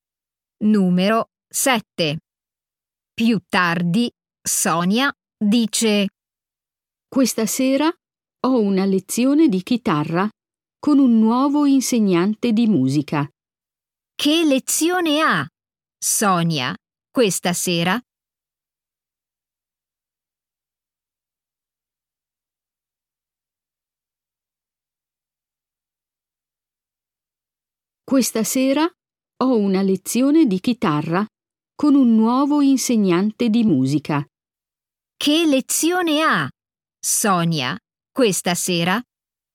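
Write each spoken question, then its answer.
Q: Che lezione ha, Sonia, questa sera?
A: una lezione di chitarra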